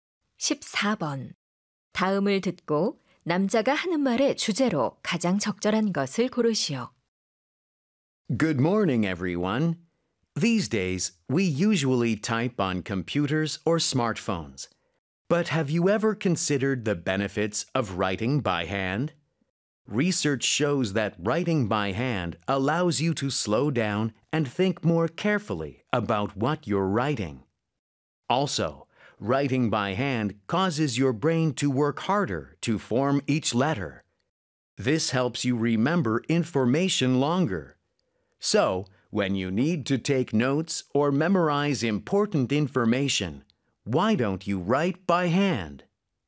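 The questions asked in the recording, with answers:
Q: 다음을 듣고 남자가 하는 말의 주제로 가장 적절한 것을 고르시오.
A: 손으로 글씨를 쓰는 것의 이점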